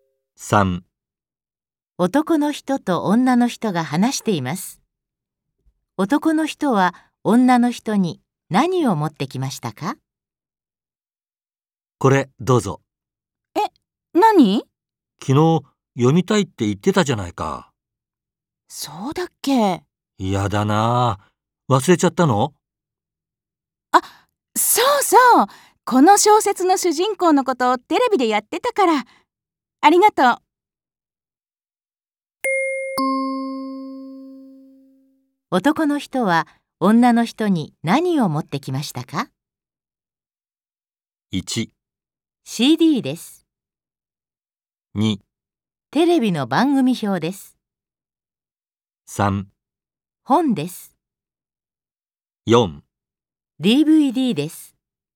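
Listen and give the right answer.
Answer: 3: 本です。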